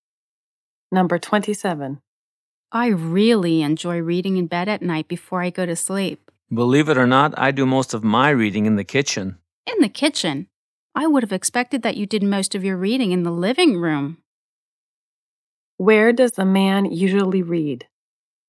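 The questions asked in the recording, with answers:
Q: Where does the man usually read?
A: In the kitchen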